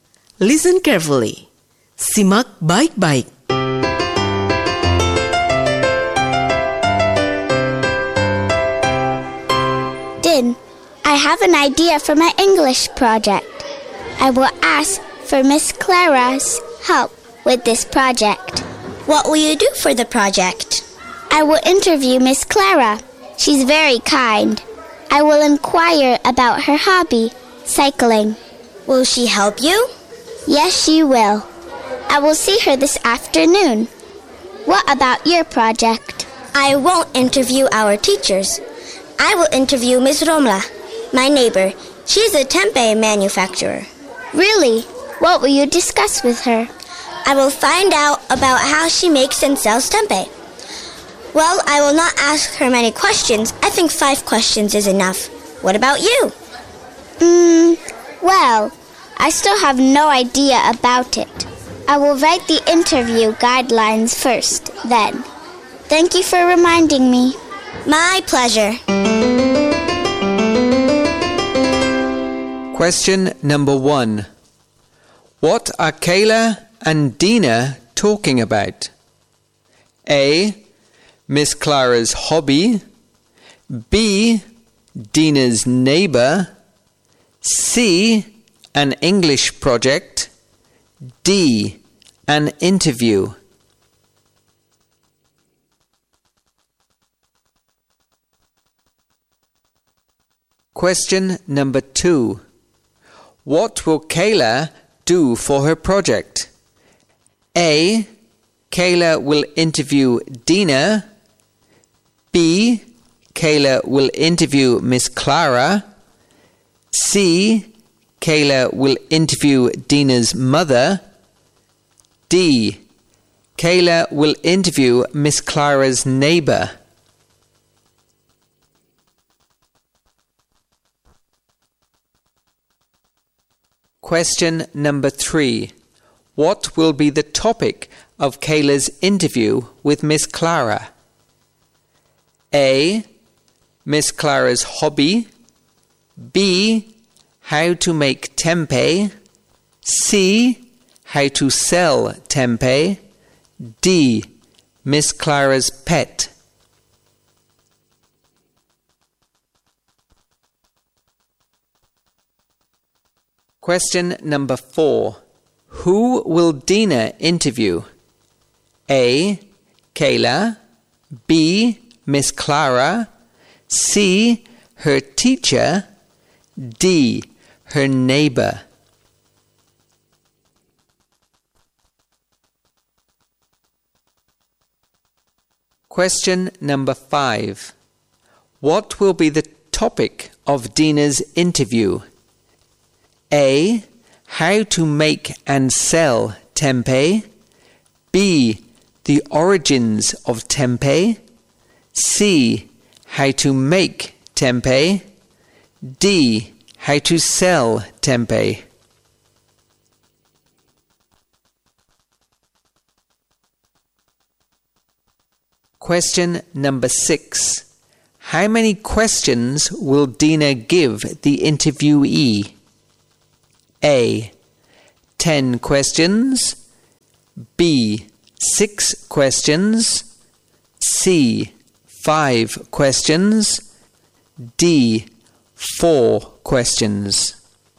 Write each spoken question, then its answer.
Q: What are Kayla and Dina talking about?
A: C. An English project.

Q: What will Kayla do for her project?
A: B. Kayla will interview Miss Clara.

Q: What will be the topic of Kayla's interview with Miss Clara?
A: A. Miss Clara's hobby.

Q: Who will Dina interview?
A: D. Her neighbor.

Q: What will be the topic of Dina's interview?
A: A. How to make and sell tempeh.

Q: How many questions will Dina give the interviewee?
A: C. 5 questions.